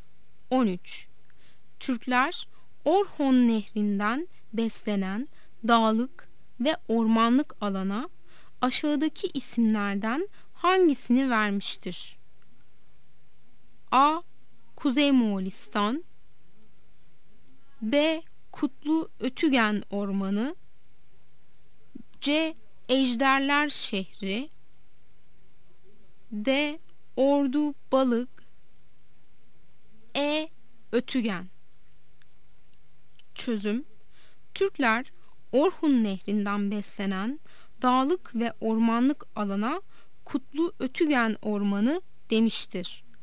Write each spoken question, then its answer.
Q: Türkler Orhon Nehri'nden beslenen dağlık ve ormanlık alana aşağıdaki isimlerden hangisini vermiştir?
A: Yanıt B'dir. Kutlu Ötügen Ormanı.